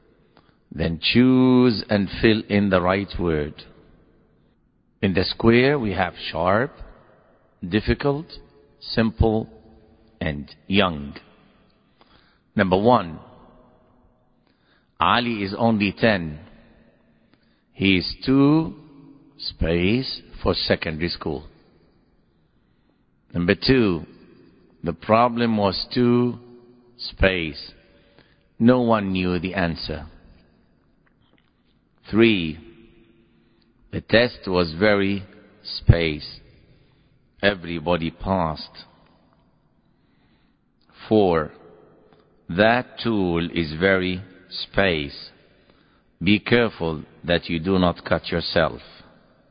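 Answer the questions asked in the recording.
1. young
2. difficult
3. simple
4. sharp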